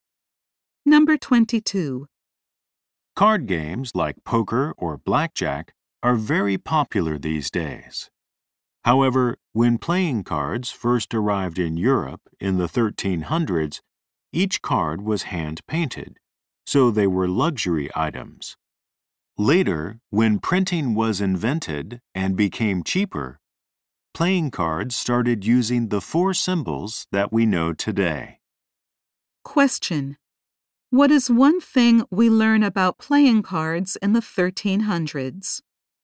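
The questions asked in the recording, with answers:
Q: What is one thing we learn about playing cards in the 1300s?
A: They were hand-painted luxury items.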